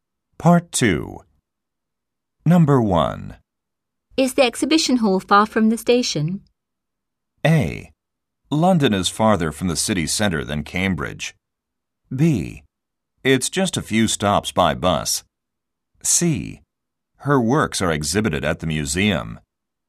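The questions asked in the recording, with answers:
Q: Is the exhibition hall far from the station?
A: B: It's just a few stops by bus.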